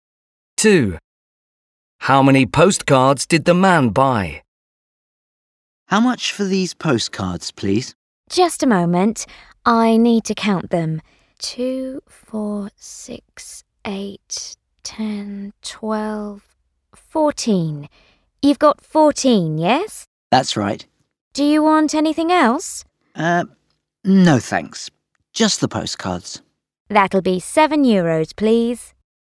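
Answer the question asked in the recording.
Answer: 14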